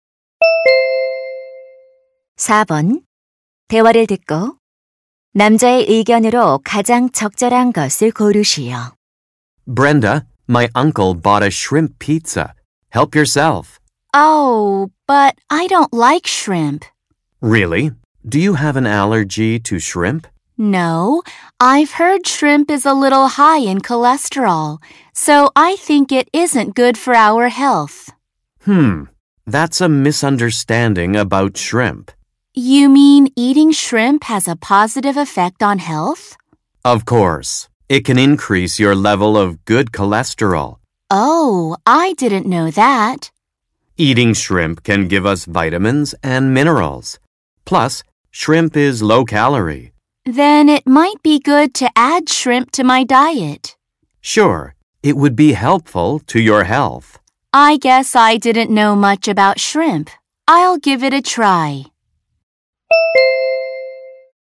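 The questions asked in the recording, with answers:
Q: 대화를 듣고 남자의 의견으로 가장 적절한 것을 고르시오.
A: 새우를 먹는 것은 건강에 좋다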